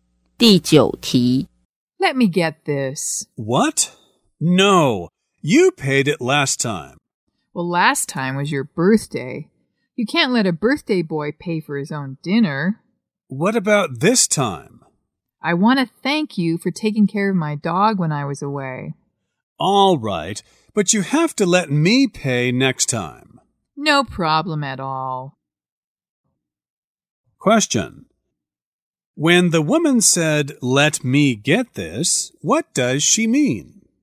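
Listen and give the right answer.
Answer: She wants to pay for the dinner.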